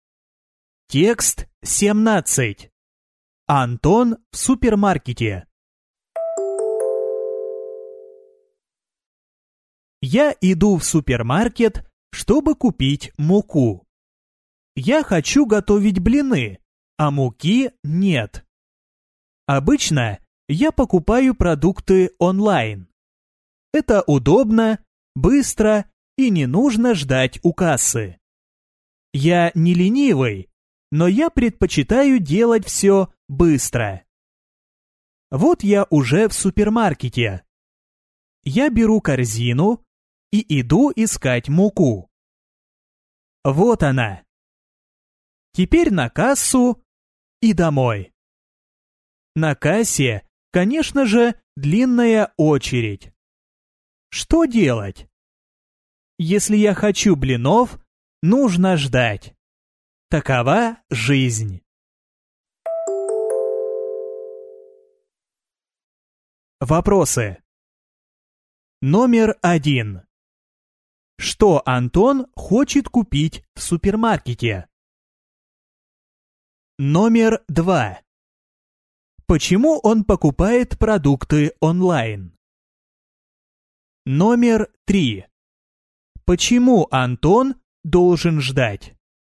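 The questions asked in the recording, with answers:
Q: Что Антон хочет купить в супермаркете?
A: Муку

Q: Почему он покупает продукты онлайн?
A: Это удобно, быстро и не нужно ждать у кассы

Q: Почему Антон должен ждать?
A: На кассе длинная очередь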